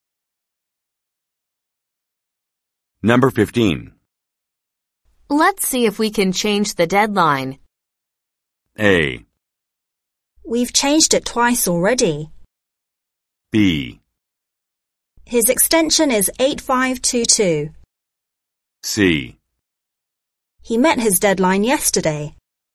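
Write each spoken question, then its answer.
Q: Let's see if we can change the deadline.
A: A: We've changed it twice already.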